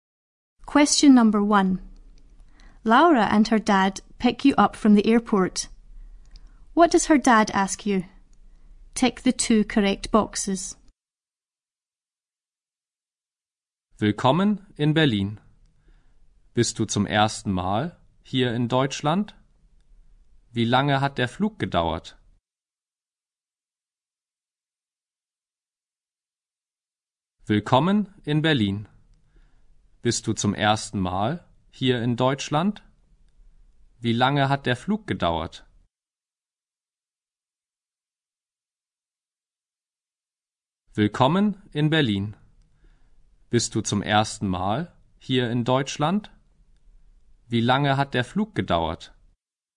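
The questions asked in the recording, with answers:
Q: What does her dad ask you?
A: If it is your first time in Germany and how long the flight took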